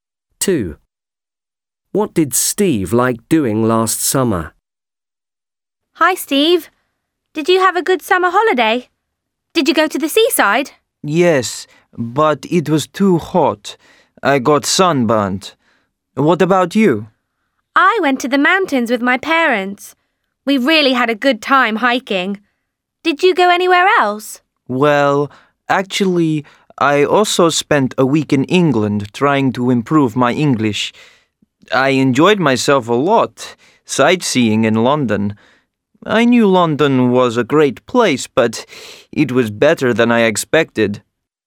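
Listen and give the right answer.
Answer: sightseeing in London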